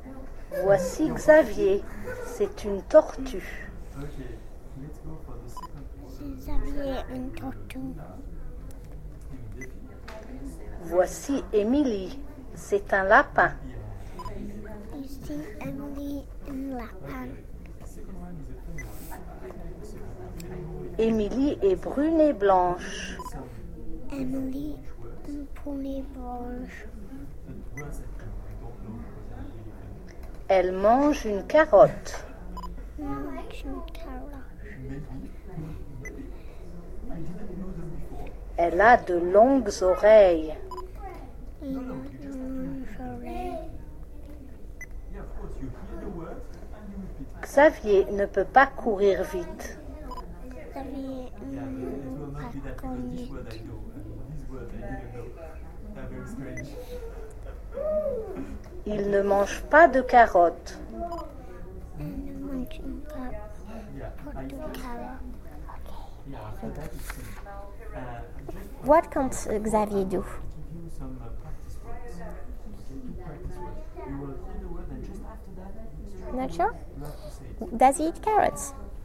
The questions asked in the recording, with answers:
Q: Does he eat carrots?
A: No, he doesn't.